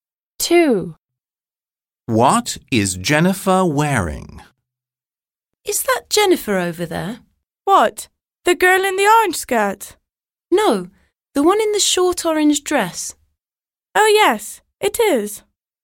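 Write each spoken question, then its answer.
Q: What is Jennifer wearing?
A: A short orange dress.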